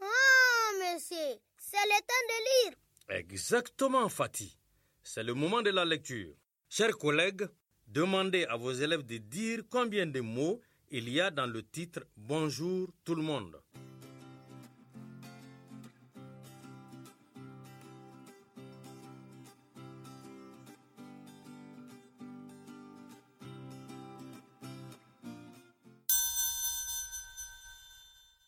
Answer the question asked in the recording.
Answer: Dans « Bonjour tout le monde », il y a quatre mots.